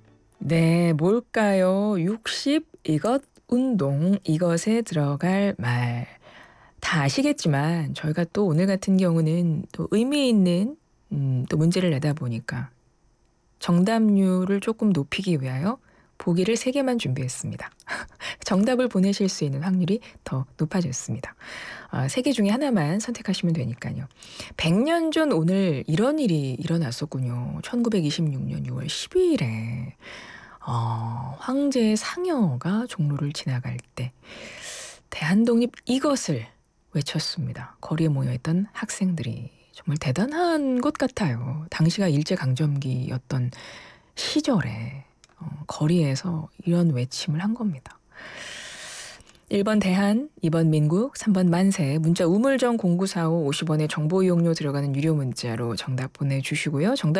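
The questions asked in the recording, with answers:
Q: 1926년 6월 12일에 황제의 상여가 종로를 지나갈 때 대한독립 이것을 외쳤습니다.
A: 3: 만세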